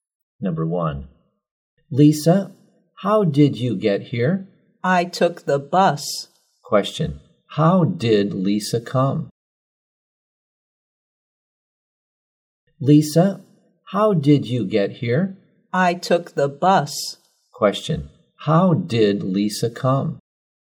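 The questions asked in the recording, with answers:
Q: Question, how did Lisa come?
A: By bus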